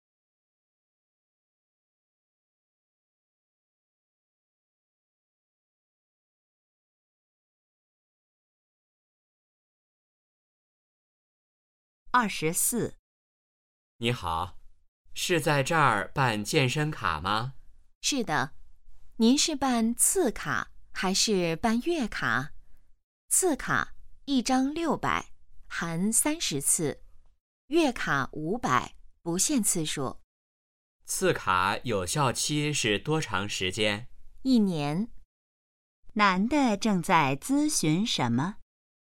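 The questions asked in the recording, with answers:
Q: 男的正在咨询什么?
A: 办健身卡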